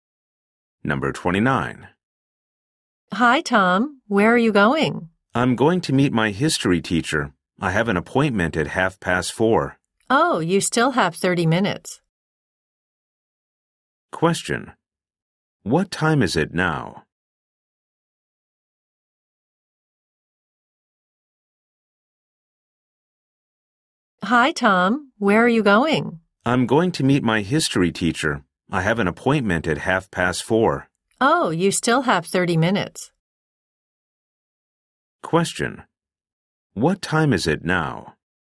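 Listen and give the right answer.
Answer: 4:00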